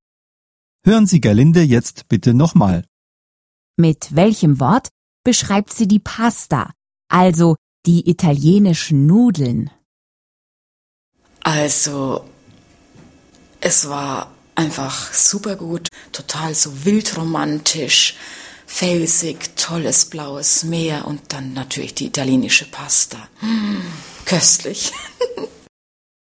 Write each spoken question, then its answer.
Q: Mit welchem Wort beschreibt sie die Pasta, also die italienischen Nudeln?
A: köstlich!